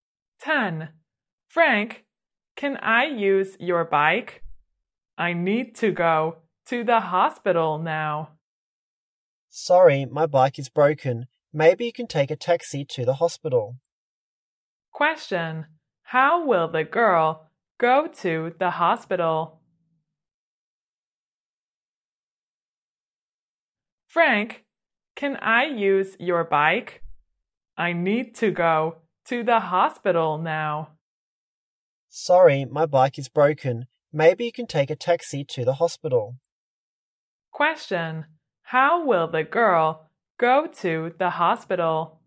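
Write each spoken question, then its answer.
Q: Question, how will the girl go to the hospital?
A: By taxi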